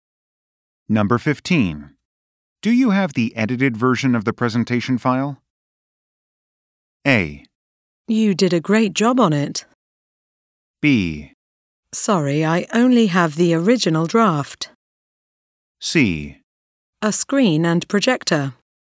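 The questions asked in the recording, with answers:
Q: Do you have the edited version of the presentation file?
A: B: Sorry, I only have the original draft.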